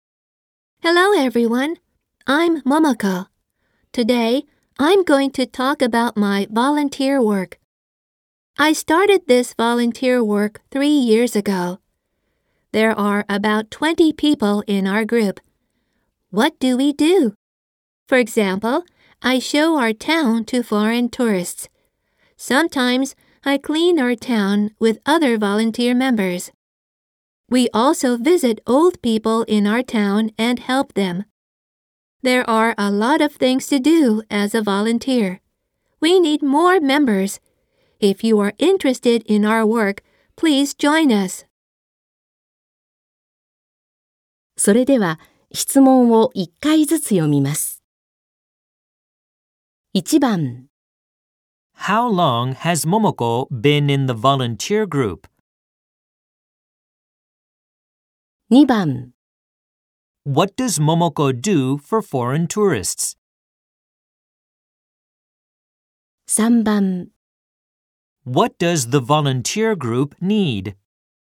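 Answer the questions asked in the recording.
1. For 3 years
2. She shows them her town
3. More members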